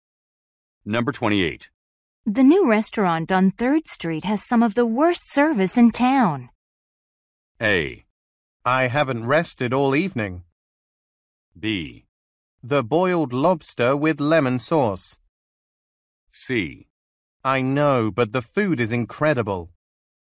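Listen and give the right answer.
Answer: C: I know, but the food is incredible.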